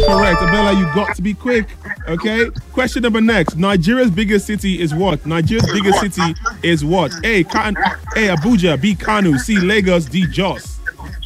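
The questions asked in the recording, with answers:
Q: Nigeria's biggest city is what?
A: C: Lagos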